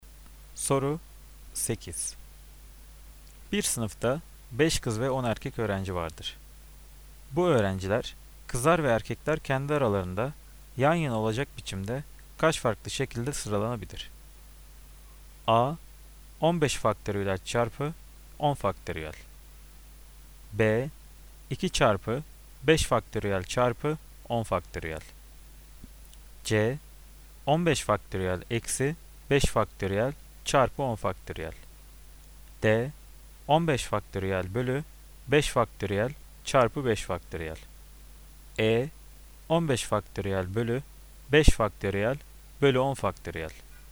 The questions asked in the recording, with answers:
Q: Bu öğrenciler, kızlar ve erkekler kendi aralarında yan yana olacak biçimde kaç farklı şekilde sıralanabilir?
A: Cevap B. 2 faktöriyel çarpı 5 faktöriyel çarpı 10 faktöriyel.